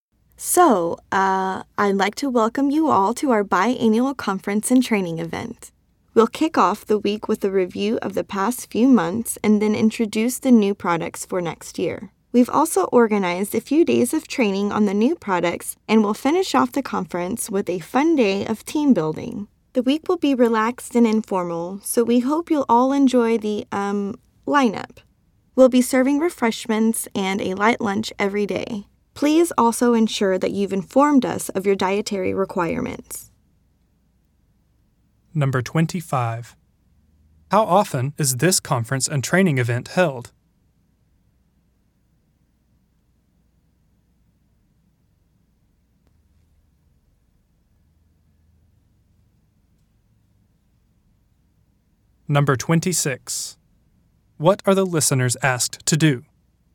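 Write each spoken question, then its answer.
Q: How often is this conference and training event held?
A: Twice a year (biannual)

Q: What are the listeners asked to do?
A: Inform the organizers of their dietary requirements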